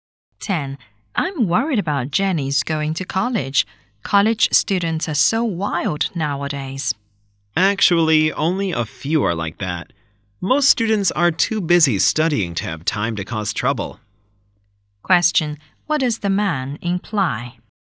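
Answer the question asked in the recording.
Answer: Most college students are too busy studying to cause trouble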